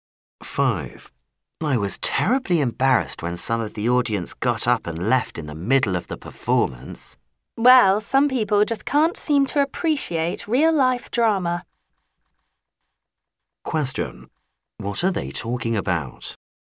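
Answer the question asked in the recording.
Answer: A play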